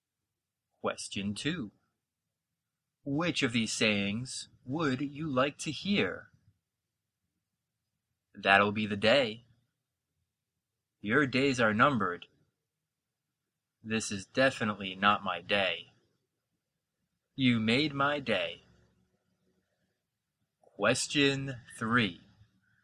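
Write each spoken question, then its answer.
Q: Which of these sayings would you like to hear?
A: D: You made my day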